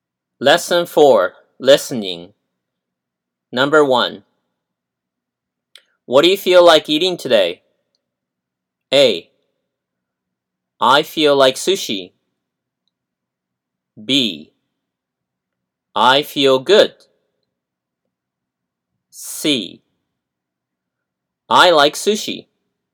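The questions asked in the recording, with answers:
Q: What do you feel like eating today?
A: A: I feel like sushi.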